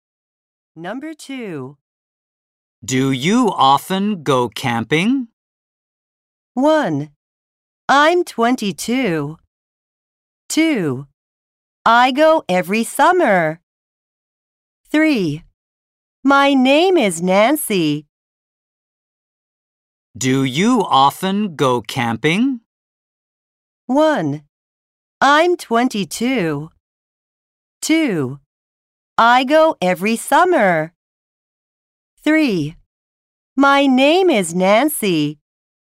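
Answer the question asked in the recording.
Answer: 2: I go every summer.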